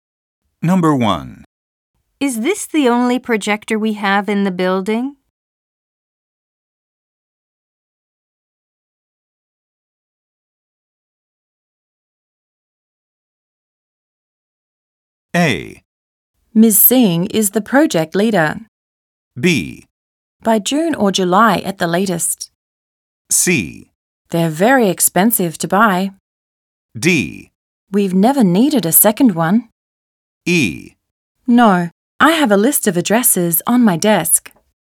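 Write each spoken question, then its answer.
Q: Is this the only projector we have in the building?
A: D: We've never needed a second one.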